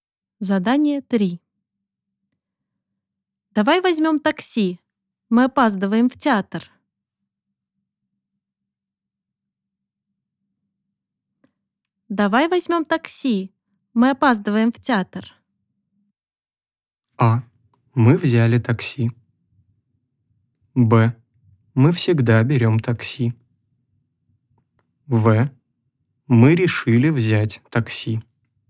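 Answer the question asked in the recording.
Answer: В: Мы решили взять такси.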